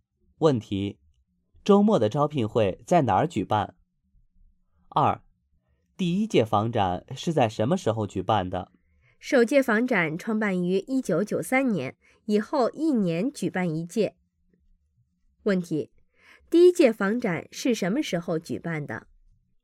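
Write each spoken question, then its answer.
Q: 第一届房展是什么时候举办的?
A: 1993年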